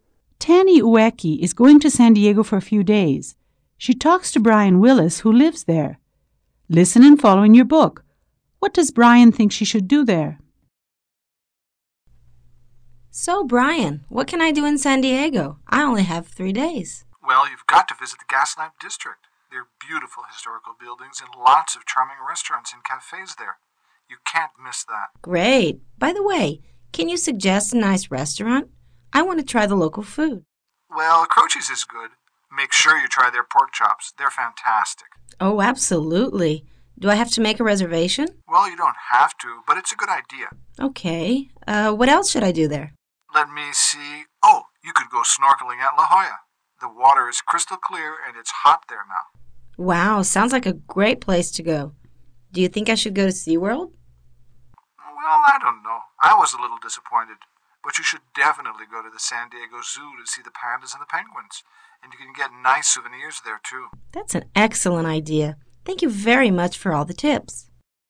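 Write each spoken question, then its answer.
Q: What does Brian think she should do there?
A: Visit the Gaslamp District, eat at Croce's (try the pork chops), go snorkeling at La Jolla, and go to the San Diego Zoo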